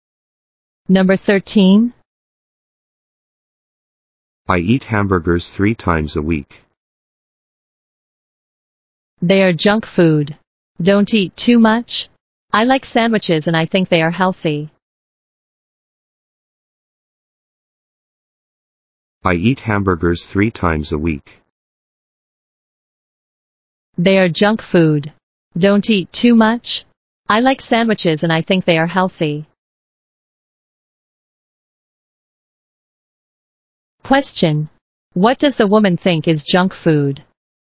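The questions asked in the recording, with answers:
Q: What does the woman think is junk food?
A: Hamburgers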